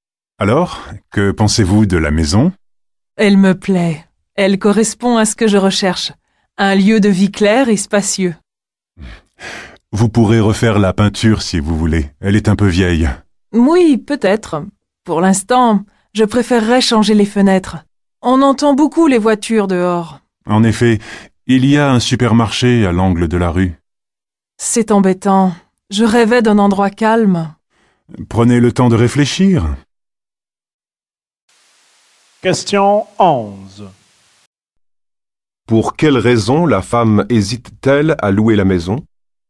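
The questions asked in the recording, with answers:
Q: Pour quelle raison la femme hésite-t-elle à louer la maison ?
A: Le bruit des voitures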